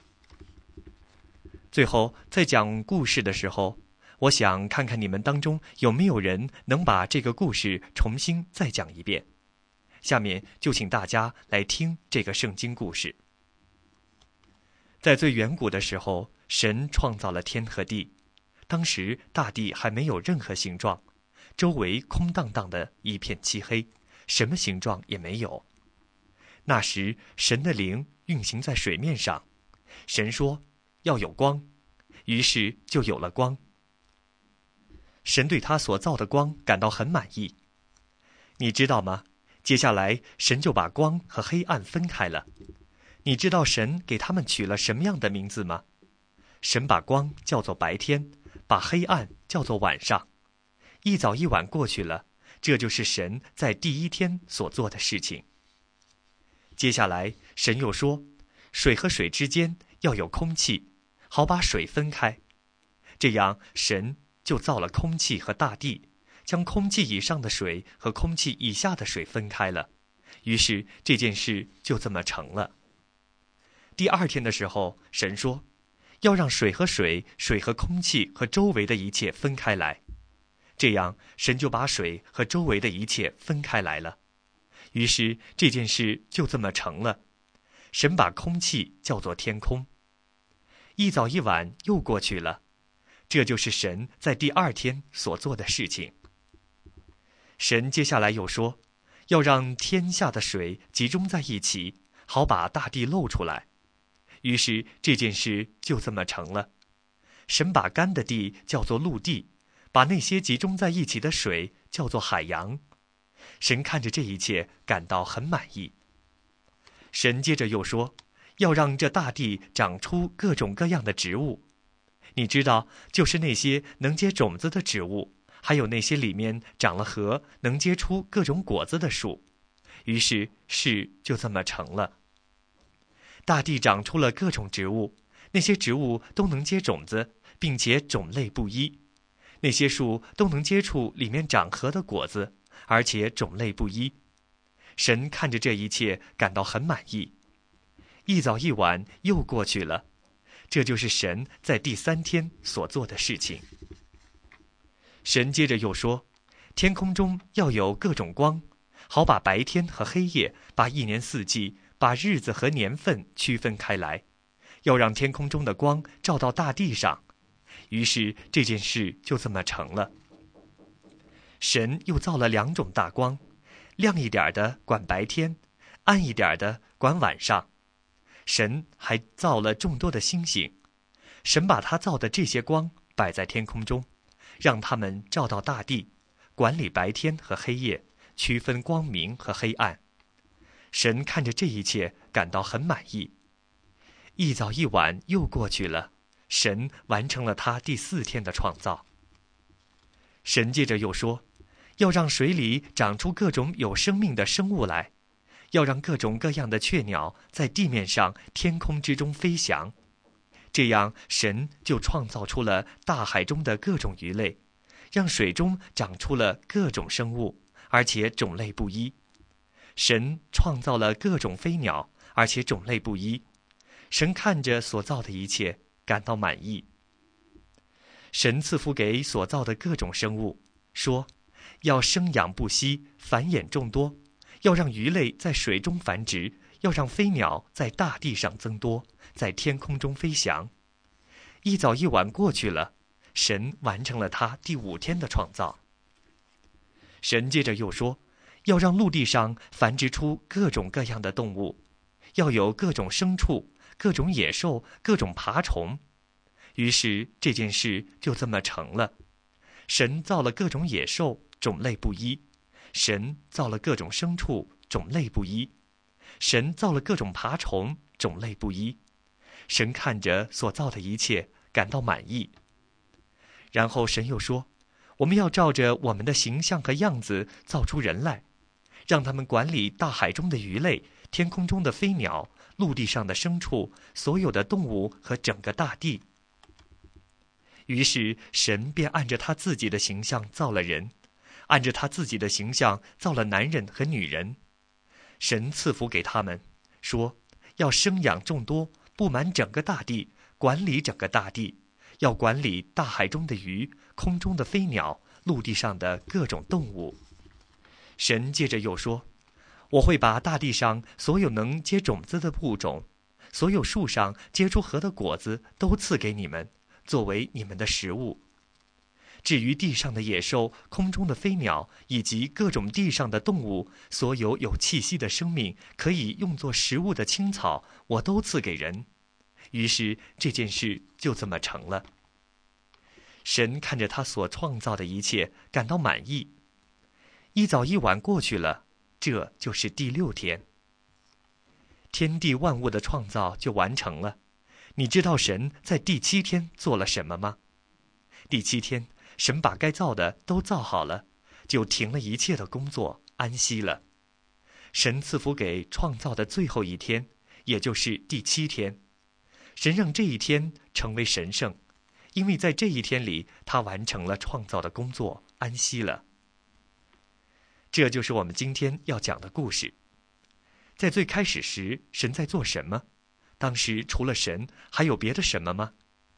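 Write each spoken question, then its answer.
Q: 在最开始时,神在做什么?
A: 神创造了天和地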